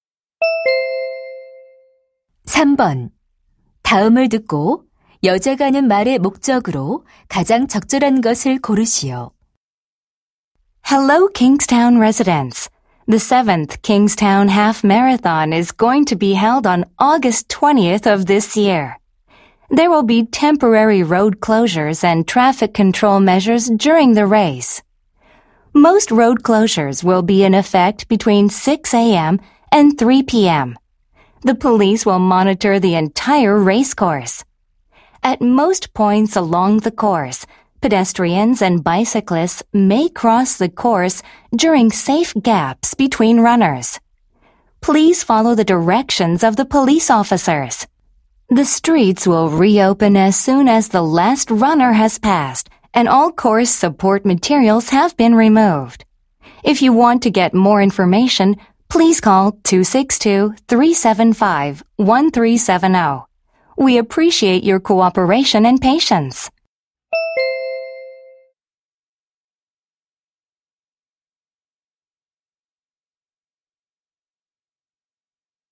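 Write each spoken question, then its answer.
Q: 다음을 듣고 여자가 하는 말의 목적으로 가장 적절한 것을 고르시오.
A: 마라톤 대회로 인한 도로 통제를 안내하려고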